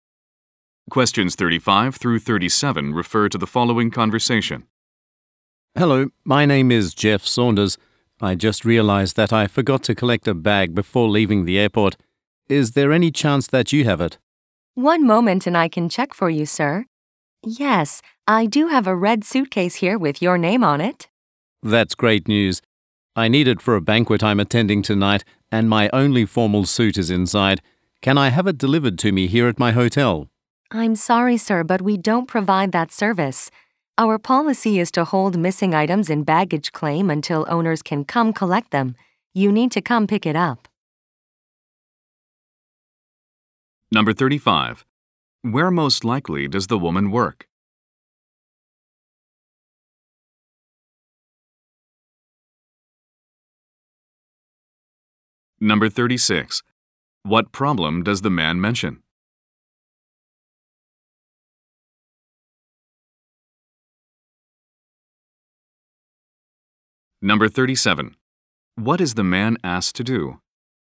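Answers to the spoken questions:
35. At an airport baggage claim
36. He left a bag at the airport
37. Come and pick up the bag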